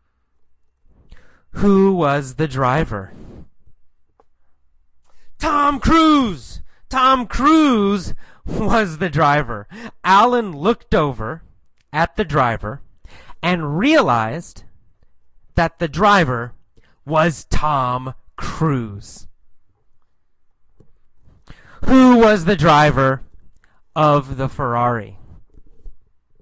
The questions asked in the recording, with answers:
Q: Who was the driver of the Ferrari?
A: Tom Cruise. Tom Cruise was the driver of the Ferrari.